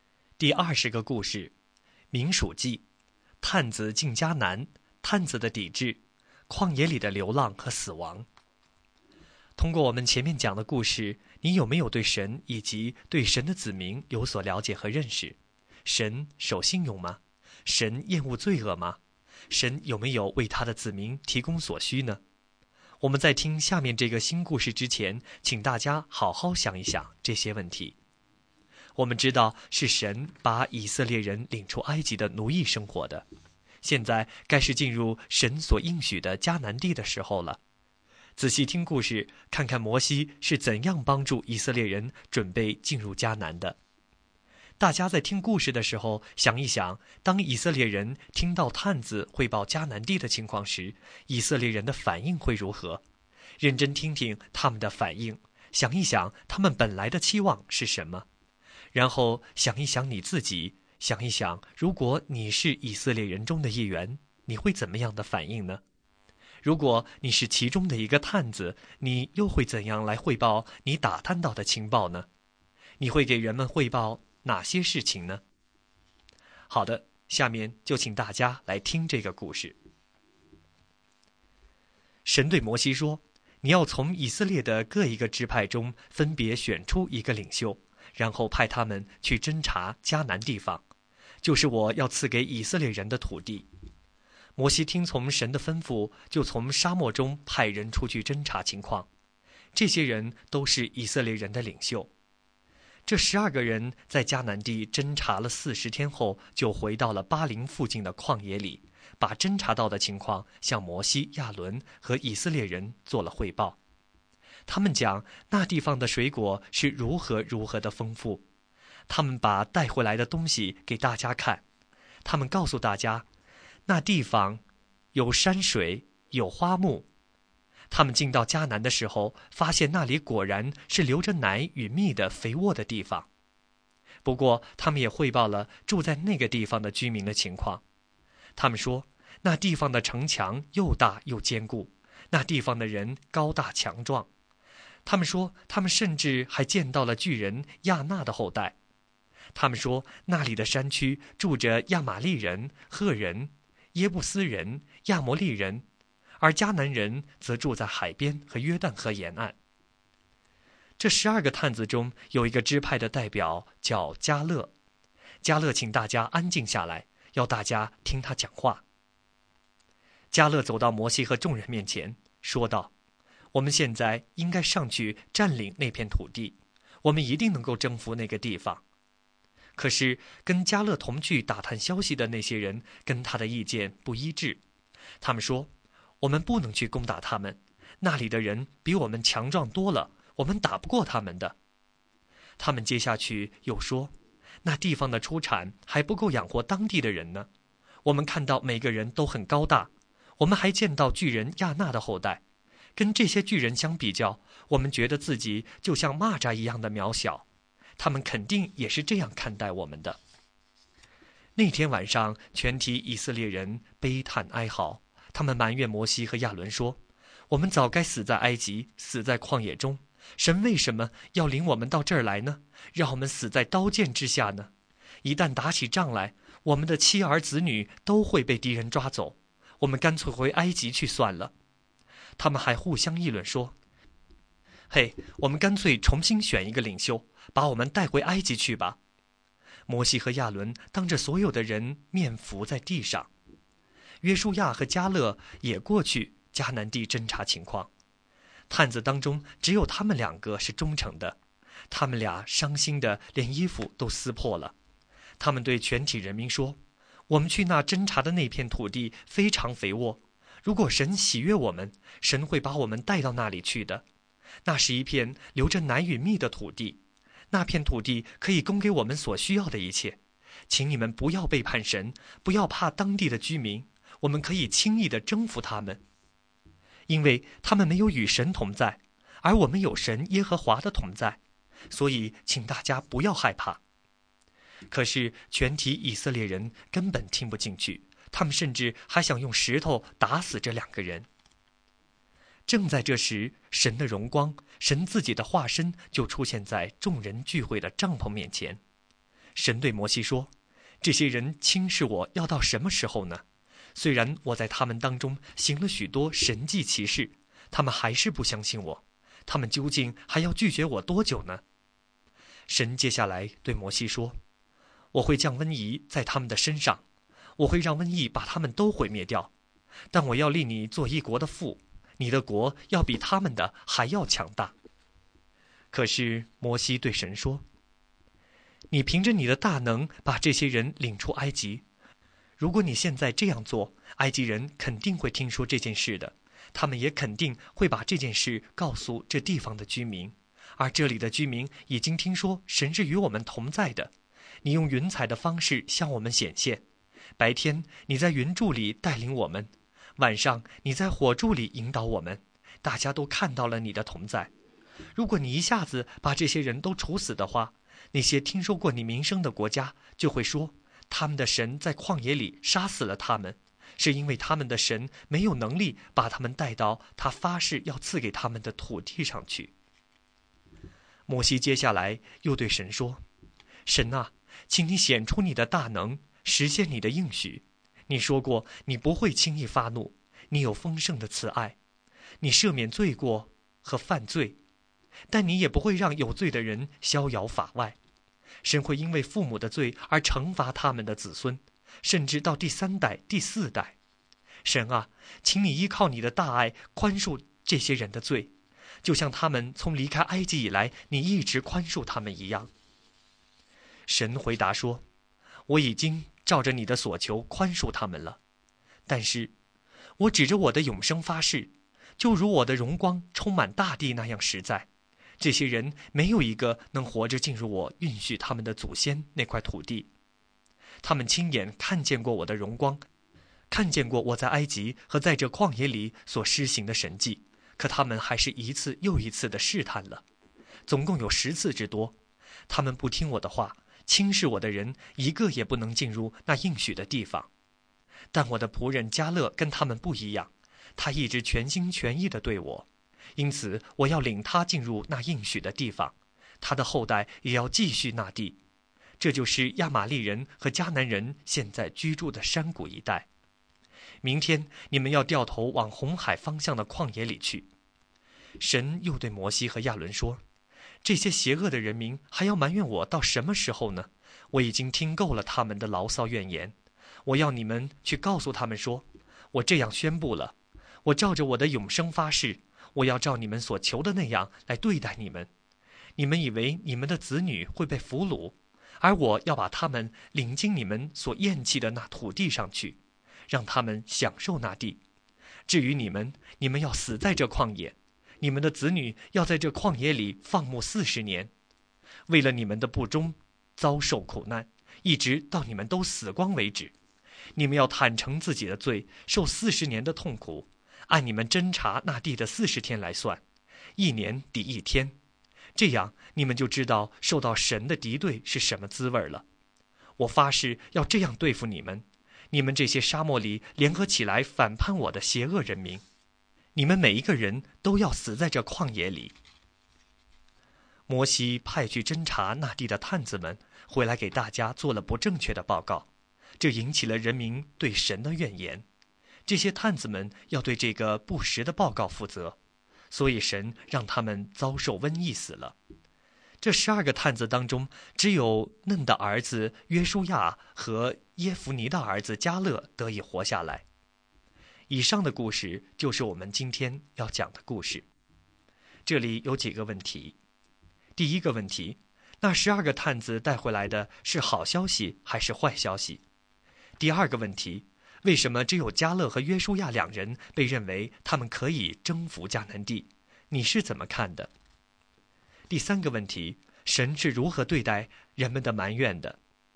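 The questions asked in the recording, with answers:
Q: 第二个问题,为什么只有加勒和约书亚两人被认为他们可以征服迦南地?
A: 因为他们忠于神、相信有神同在,所以不怕当地居民

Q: 第三个问题,神是如何对待人们的埋怨的?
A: 神惩罚他们:他们要在旷野漂流40年,全都死在旷野,不能进入应许之地;报假消息的探子死于瘟疫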